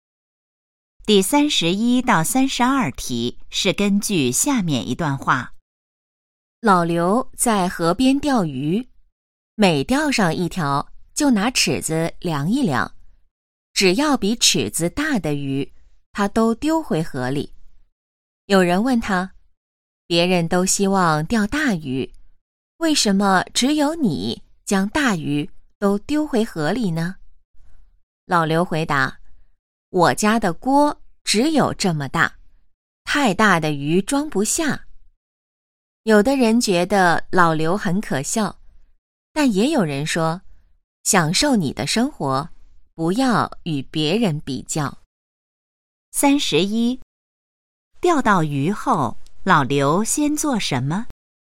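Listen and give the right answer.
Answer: 拿尺子量一量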